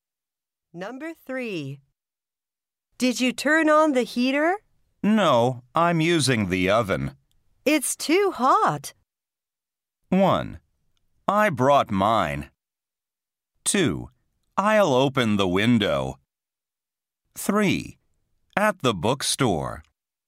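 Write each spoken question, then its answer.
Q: It's too hot.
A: 2: I'll open the window.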